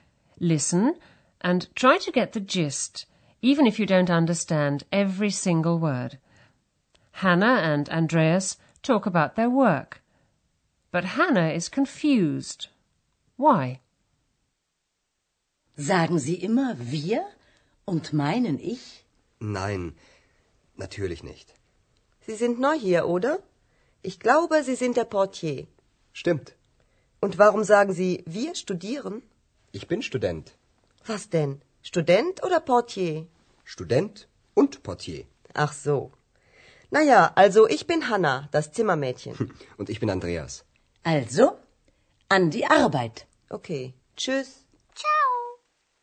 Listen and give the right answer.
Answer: Hannah is confused because Andreas says he's a student, although he's just told her that he's the hotel porter.